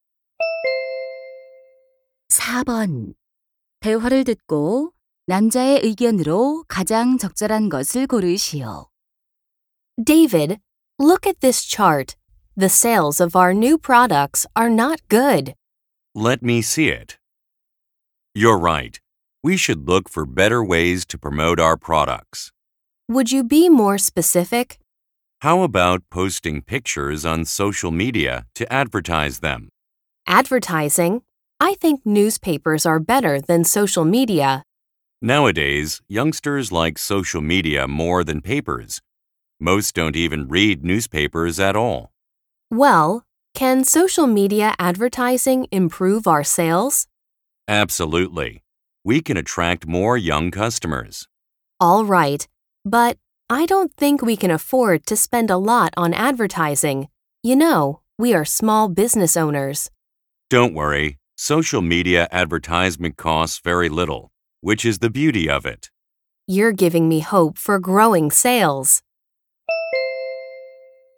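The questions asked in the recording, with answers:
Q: 대화를 듣고 남자의 의견으로 가장 적절한 것을 고르시오.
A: 소셜 미디어 광고가 저렴하고 판매 증진에 효과적이다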